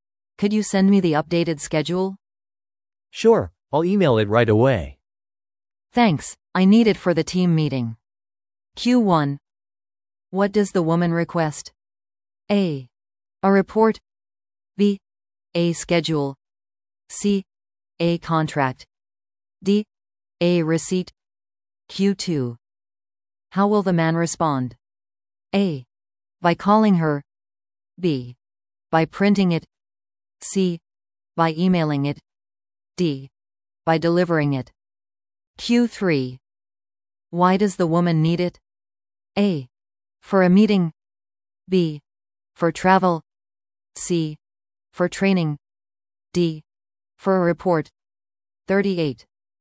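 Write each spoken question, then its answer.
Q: What does the woman request?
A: B: A schedule.

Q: How will the man respond?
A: C: By emailing it.

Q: Why does the woman need it?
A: A: For a meeting.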